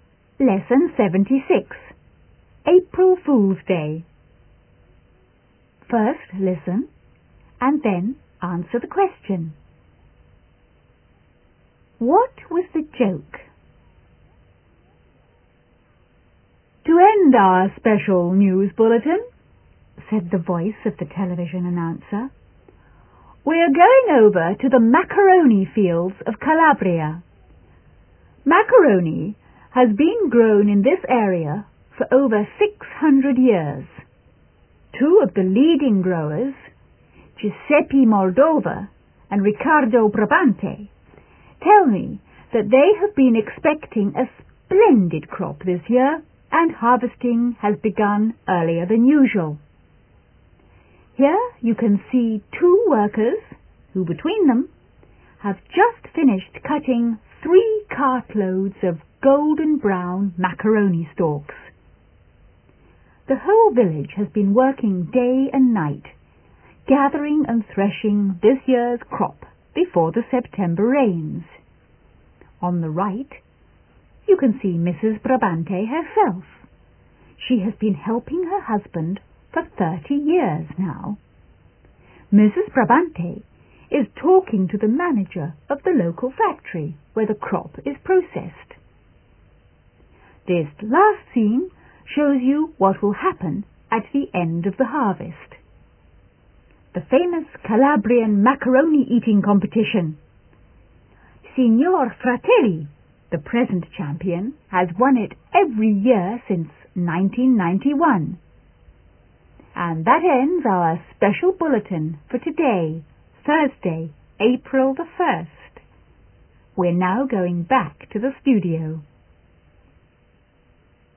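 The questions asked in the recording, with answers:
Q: What was the joke?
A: The bulletin pretended macaroni grows as a crop in fields and is harvested, as an April Fool's joke.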